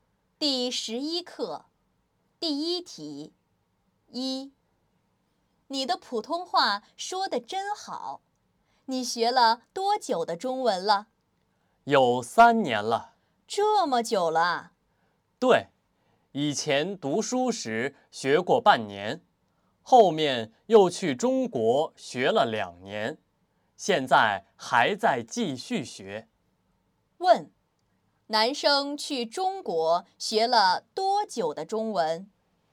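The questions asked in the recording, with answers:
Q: 男生去中国学了多久的中文?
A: 两年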